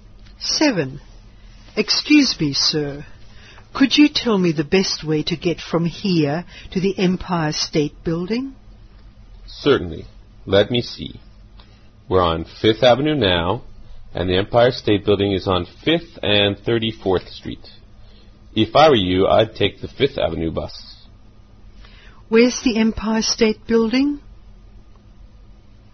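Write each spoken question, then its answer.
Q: Where's the Empire State Building?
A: On 5th Avenue and 34th Street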